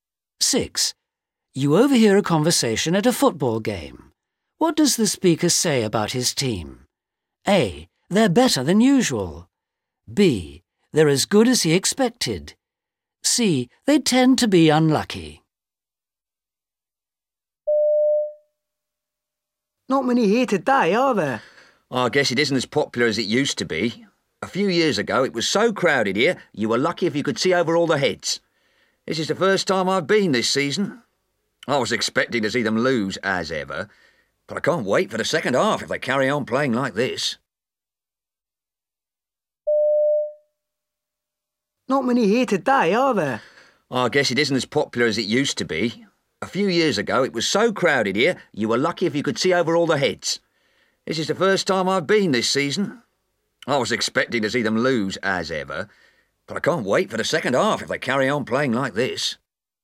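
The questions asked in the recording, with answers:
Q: What does the speaker say about his team? A. They're better than usual. B. They're as good as he expected. C. They tend to be unlucky.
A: A: They're better than usual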